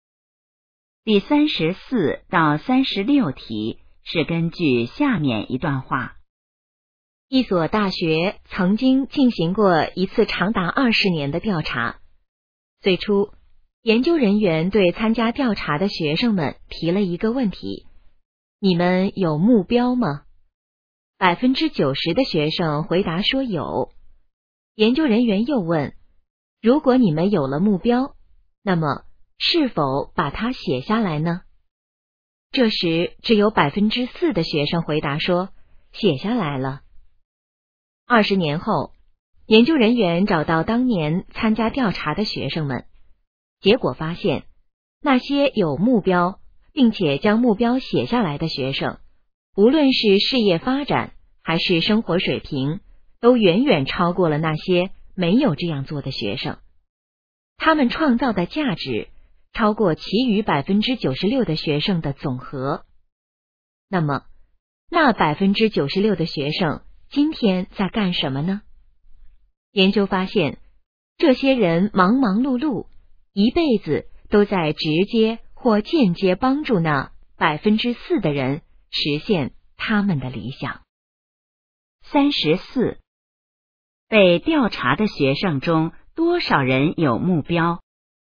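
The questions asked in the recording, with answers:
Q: 被调查的学生中多少人有目标?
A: 90%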